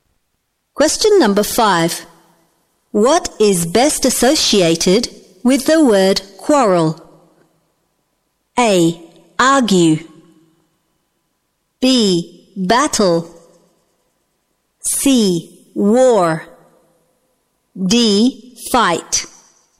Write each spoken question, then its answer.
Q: What is best associated with the word quarrel?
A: A. Argue.